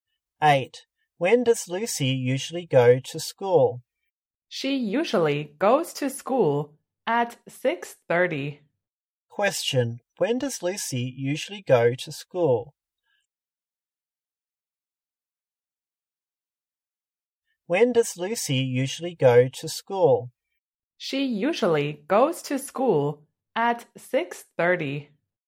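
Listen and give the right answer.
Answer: At 6:30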